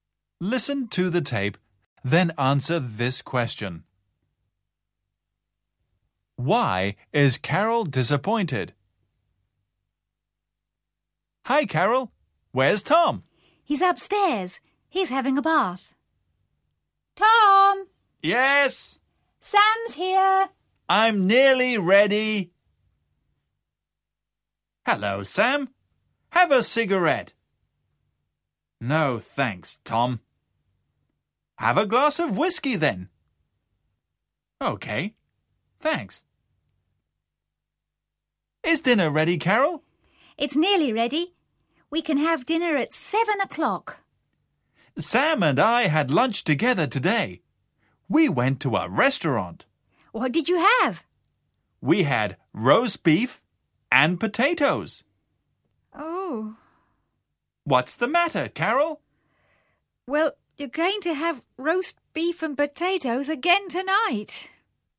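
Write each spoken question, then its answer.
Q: Why is Carol disappointed?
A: Because Tom and Sam already had roast beef and potatoes for lunch, and she is serving the same for dinner.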